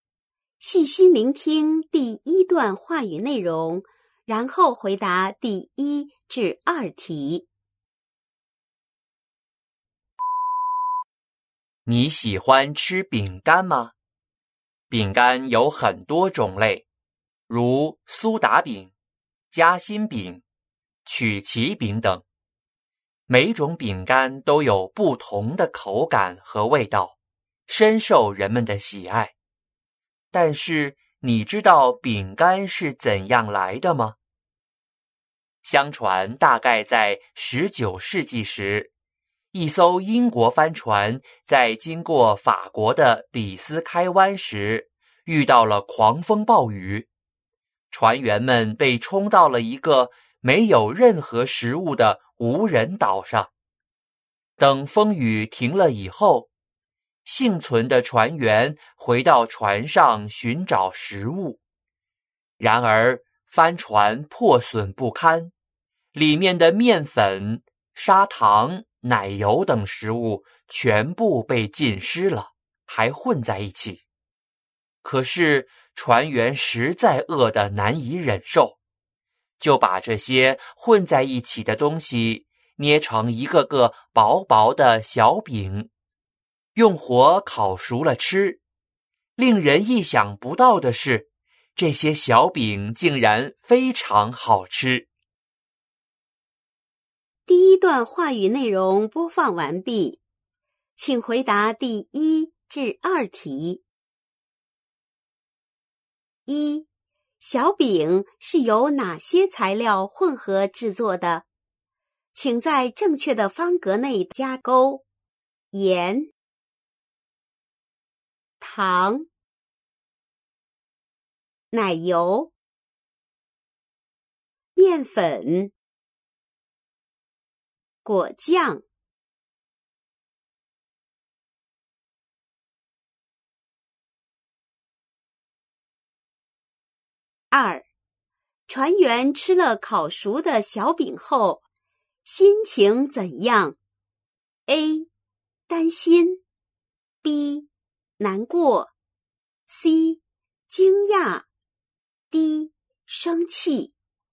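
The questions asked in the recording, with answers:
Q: 小饼是由哪些材料混合制作的?请在正确的方格内加勾。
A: 糖、奶油、面粉

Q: 船员吃了烤熟的小饼后,心情怎样?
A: C: 惊讶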